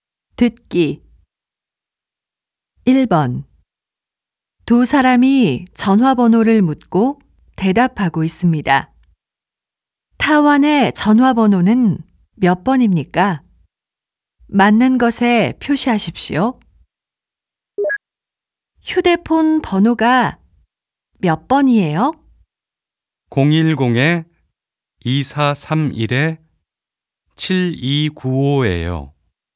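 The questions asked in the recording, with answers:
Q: 타원의 전화번호는 몇 번입니까?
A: 010-2431-7295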